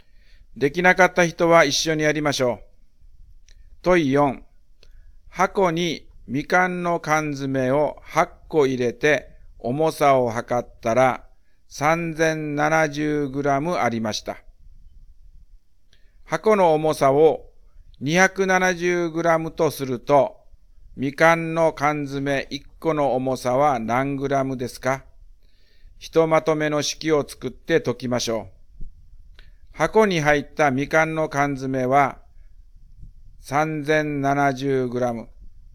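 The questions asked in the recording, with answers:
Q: 箱の重さを 270g とすると、みかんの缶詰1個の重さは何グラムですか?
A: 350g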